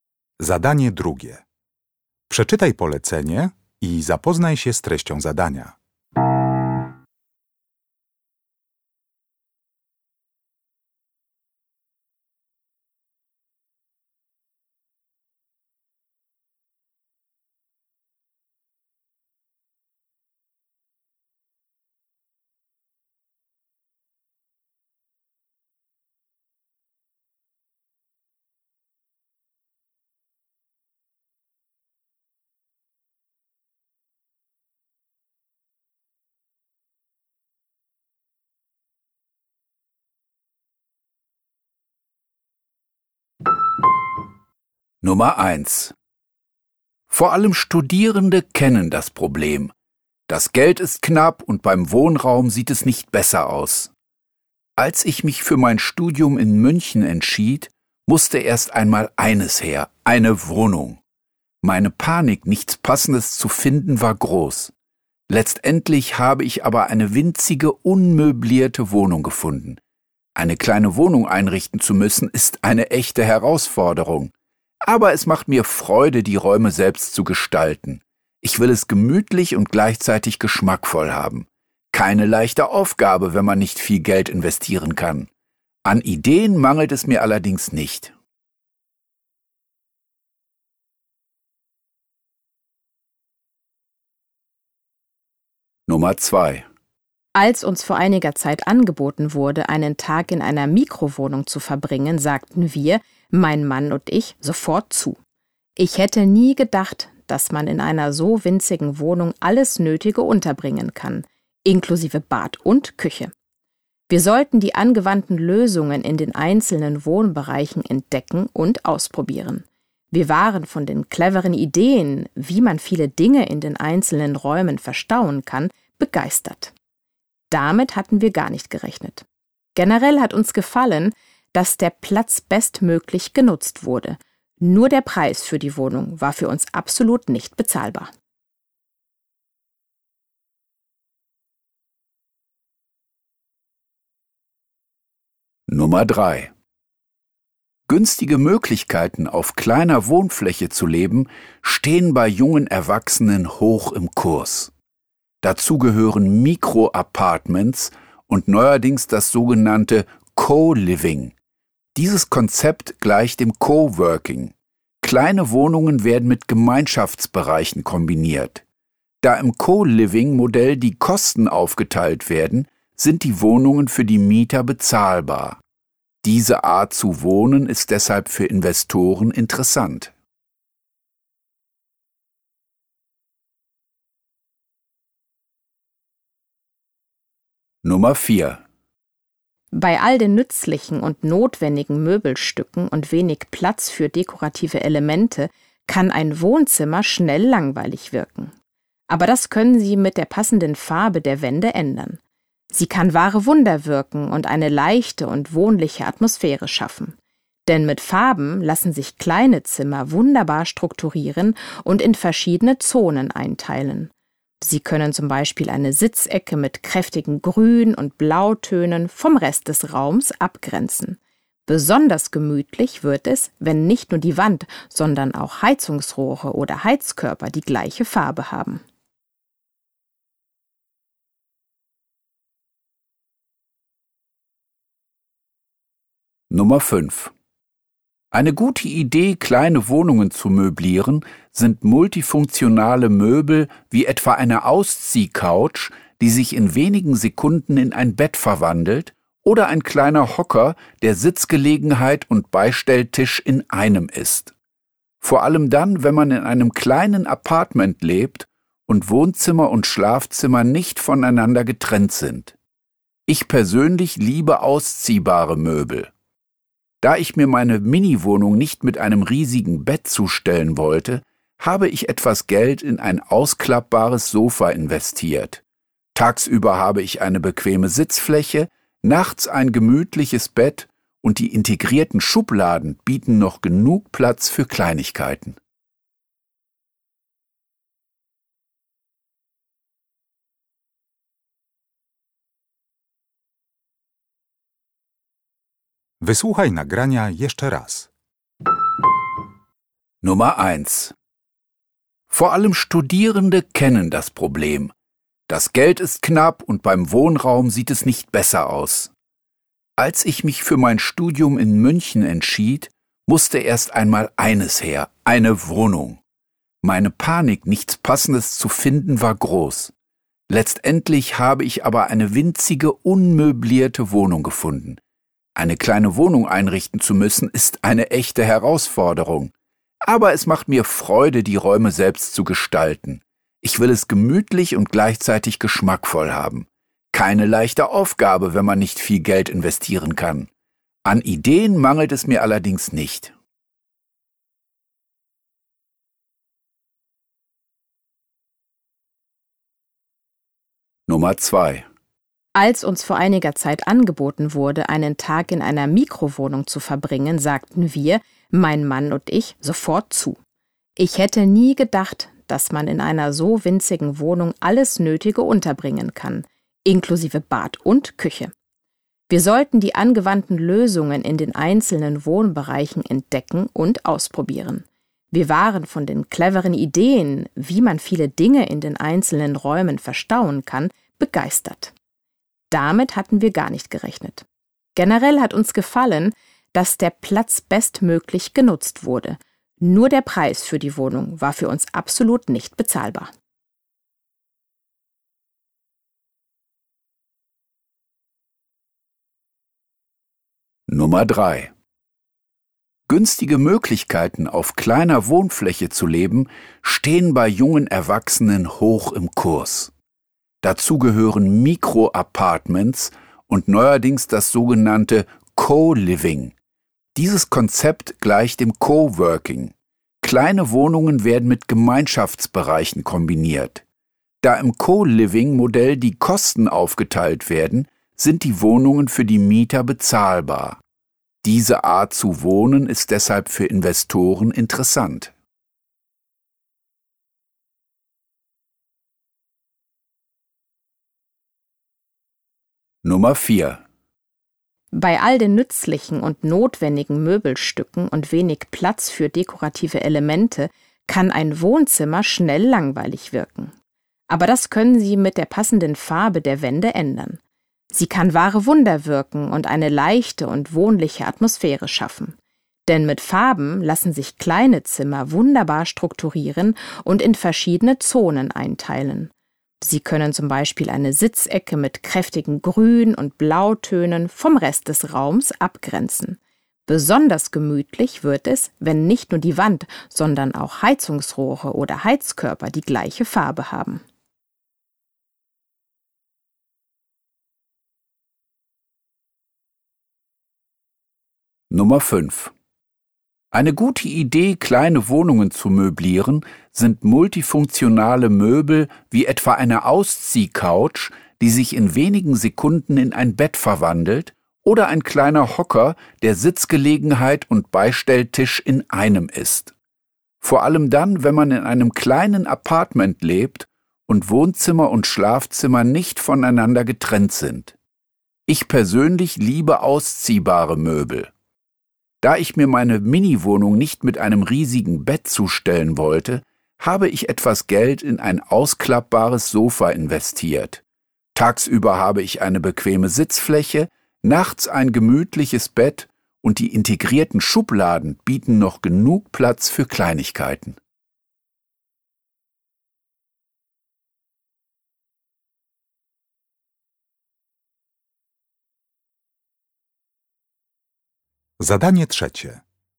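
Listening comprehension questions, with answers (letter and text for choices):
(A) Diese Person erklärt, wie wichtig die Raumbeleuchtung ist.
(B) Diese Person beschreibt praktische Einrichtungsgegenstände.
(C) Diese Person hat Spaß beim Einrichten ihrer kleinen Wohnung.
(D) Diese Person spricht über eine Wohnform, die eine gute Investition sein kann.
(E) Diese Person war positiv überrascht von den Ideen zur Wohnraumgestaltung.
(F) Diese Person gibt Tipps, wie man kleine Räume durch neues Streichen beleben kann.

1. Nummer 1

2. Nummer 2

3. Nummer 3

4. Nummer 4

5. Nummer 5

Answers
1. (C) Diese Person hat Spaß beim Einrichten ihrer kleinen Wohnung.
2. (E) Diese Person war positiv überrascht von den Ideen zur Wohnraumgestaltung.
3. (D) Diese Person spricht über eine Wohnform, die eine gute Investition sein kann.
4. (F) Diese Person gibt Tipps, wie man kleine Räume durch neues Streichen beleben kann.
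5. (B) Diese Person beschreibt praktische Einrichtungsgegenstände.

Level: Poziom: rozszerzony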